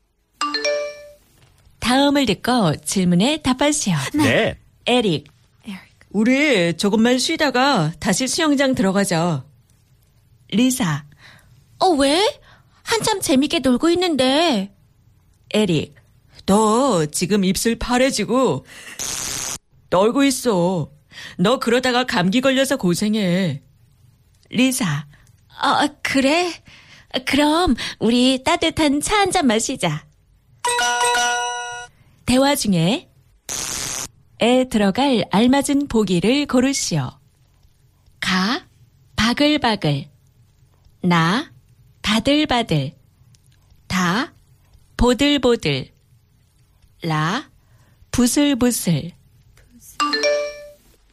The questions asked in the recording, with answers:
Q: 대화 중에 에 들어갈 알맞은 보기를 고르시오.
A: So the correct answer was